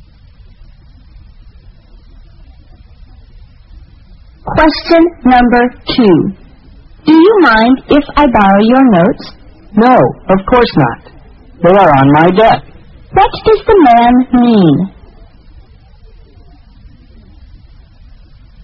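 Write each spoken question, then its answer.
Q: What does the man mean?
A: He doesn't mind lending his notes; they are on his desk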